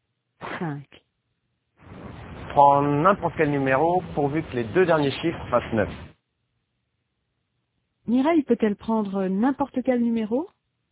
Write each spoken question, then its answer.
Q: Mireille peut-elle prendre n'importe quel numéro?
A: Oui, pourvu que les deux derniers chiffres fassent 9.